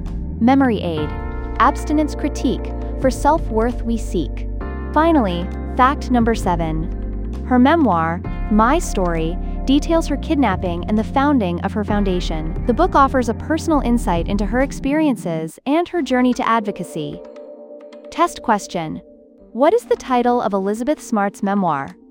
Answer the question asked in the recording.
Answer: Correct answer, My Story.